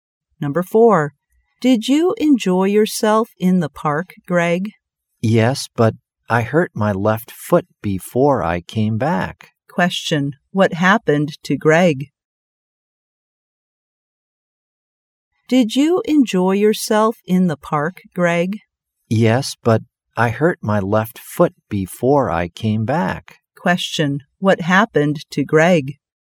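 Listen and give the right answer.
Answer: He hurt his left foot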